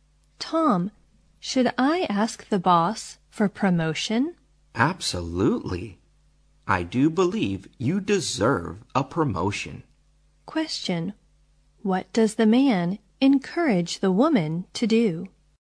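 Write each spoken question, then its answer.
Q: What does the man encourage the woman to do?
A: Ask the boss for a promotion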